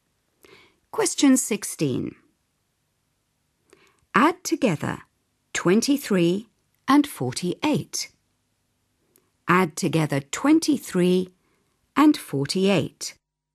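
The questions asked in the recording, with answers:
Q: Add together 23 and 48.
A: 71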